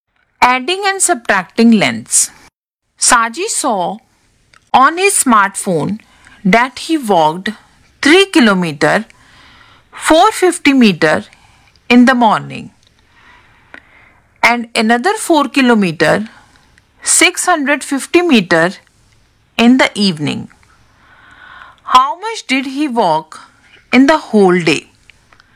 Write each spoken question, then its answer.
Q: How much did he walk in the whole day?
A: which is equal to 8 kilometer 100 meter